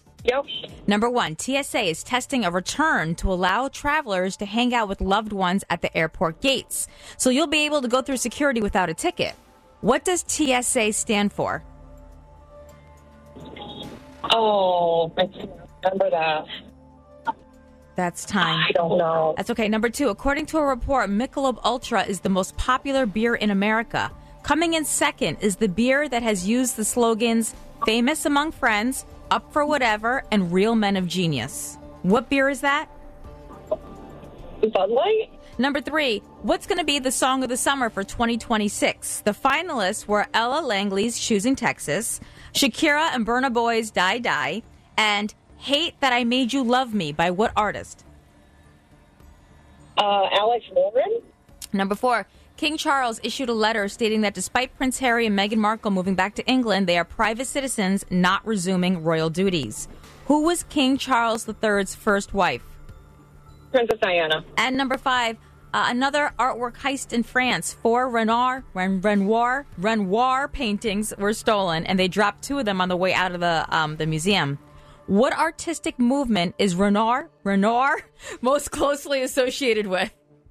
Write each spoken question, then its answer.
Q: What beer is that?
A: Bud Light.

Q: Who was King Charles III's first wife?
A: Princess Diana.